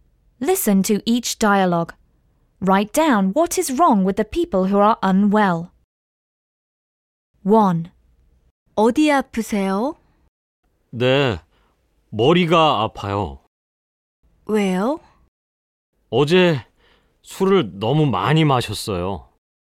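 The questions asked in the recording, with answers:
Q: Write down what is wrong with the people who are unwell.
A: Headache (drank too much yesterday)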